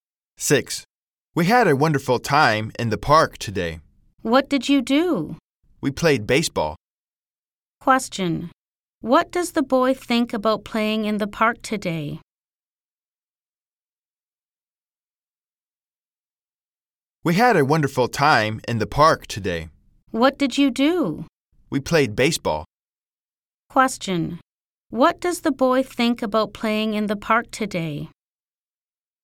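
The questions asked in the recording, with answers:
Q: Question. What does the boy think about playing in the park today?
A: It was wonderful.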